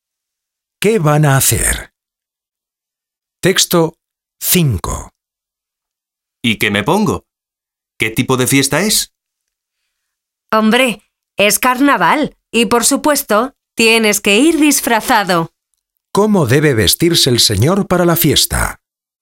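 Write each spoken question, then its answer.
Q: ¿Cómo debe vestirse el señor para la fiesta?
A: Disfrazado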